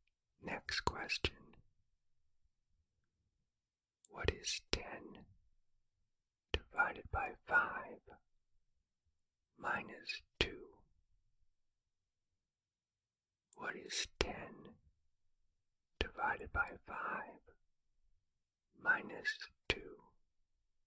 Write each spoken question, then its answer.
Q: What is 10 divided by 5 minus 2?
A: The answer is 0.